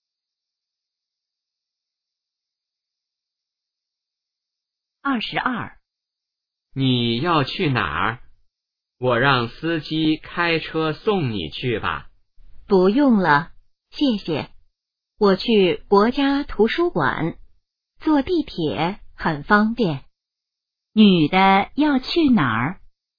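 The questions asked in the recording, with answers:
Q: 女的要去哪儿?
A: 国家图书馆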